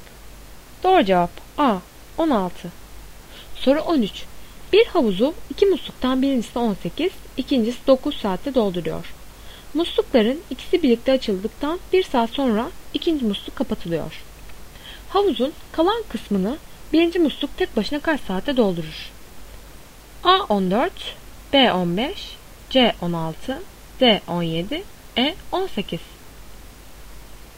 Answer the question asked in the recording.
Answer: Doğru cevap B 15.